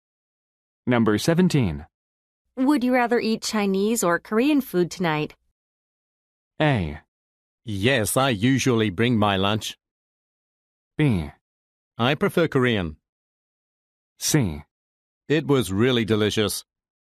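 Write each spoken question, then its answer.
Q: Would you rather eat Chinese or Korean food tonight?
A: B: I prefer Korean.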